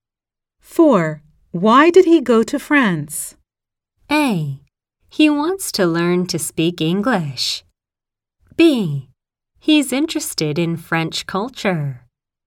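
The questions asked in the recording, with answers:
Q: Why did he go to France?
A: B: He's interested in French culture.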